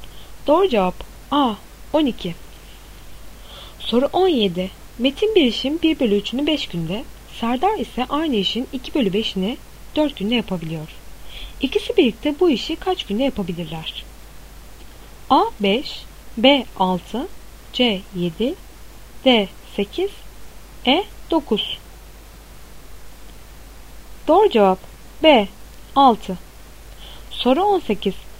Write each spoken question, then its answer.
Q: İkisi birlikte bu işi kaç günde yapabilirler?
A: Doğru cevap B. 6.